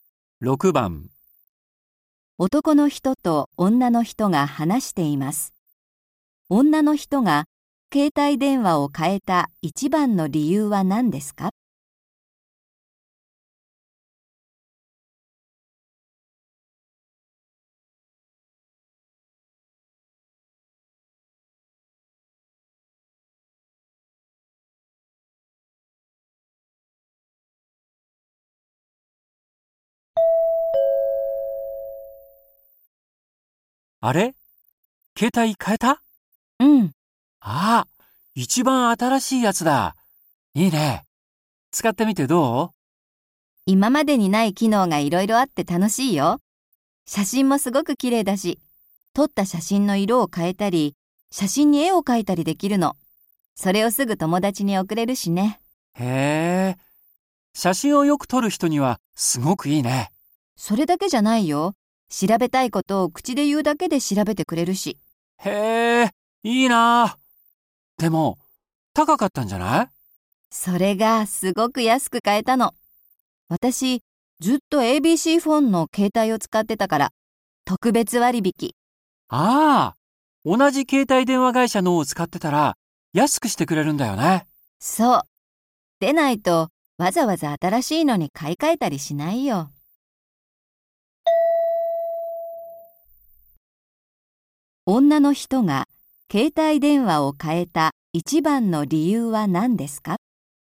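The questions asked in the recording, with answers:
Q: 女の人が携帯電話を変えた一番の理由は何ですか?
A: 同じ携帯電話会社を使っていたので特別割引で安く買えたから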